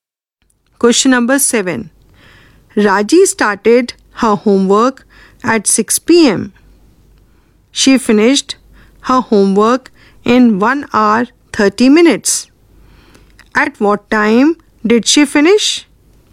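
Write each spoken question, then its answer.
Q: At what time did she finish?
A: 7:30 p.m.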